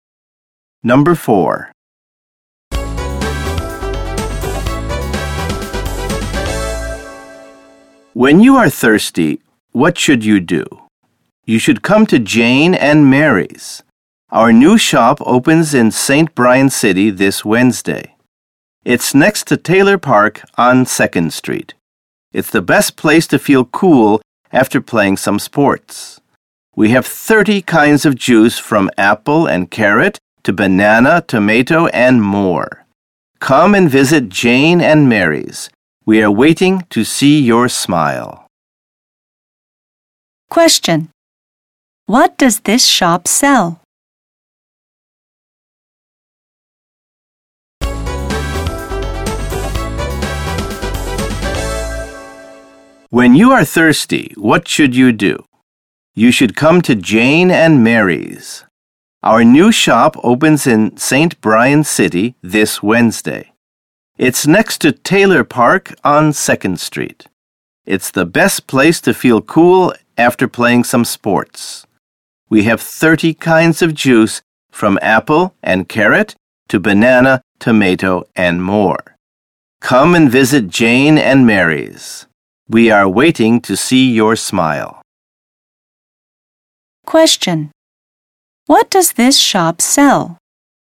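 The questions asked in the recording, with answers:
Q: What does this shop sell?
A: Juice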